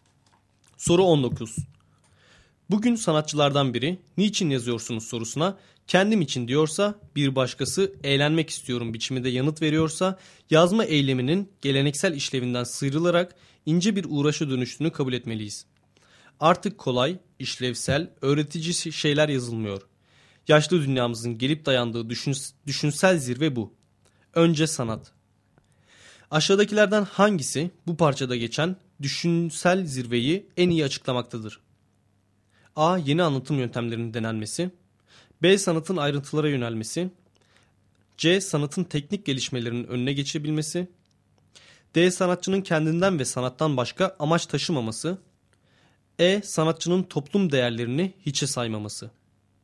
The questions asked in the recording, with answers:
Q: Aşağıdakilerden hangisi bu parçada geçen düşünsel zirveyi en iyi açıklamaktadır?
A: Doğru cevap D şıkkı.